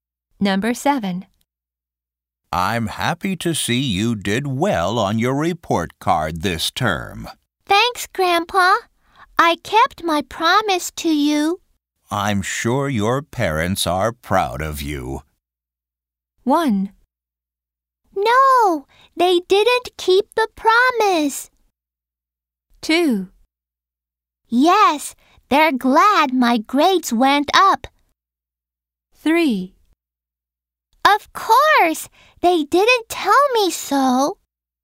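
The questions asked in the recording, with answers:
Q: I'm sure your parents are proud of you.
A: 2: Yes, they're glad my grades went up.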